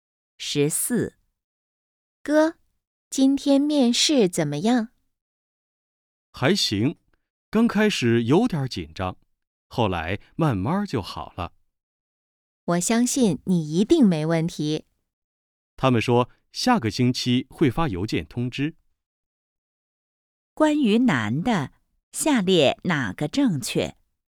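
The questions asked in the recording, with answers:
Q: 关于男的,下列哪个正确?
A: 他今天去面试了,下星期会收到邮件通知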